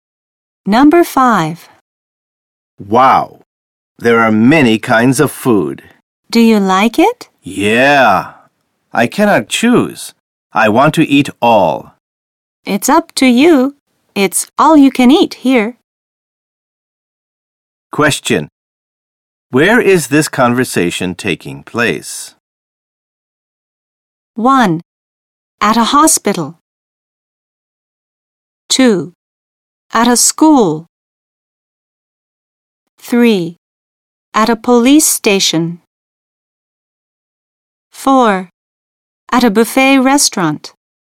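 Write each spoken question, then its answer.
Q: Where is this conversation taking place?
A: 4: At a buffet restaurant.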